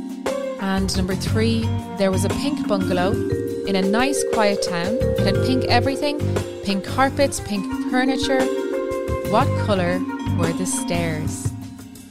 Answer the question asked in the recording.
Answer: It's a bungalow, so there are no stairs.